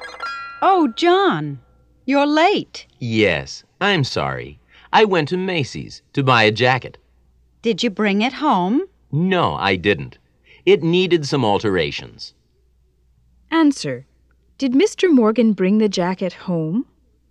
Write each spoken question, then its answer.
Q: Did Mr. Morgan bring the jacket home?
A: No, he didn't.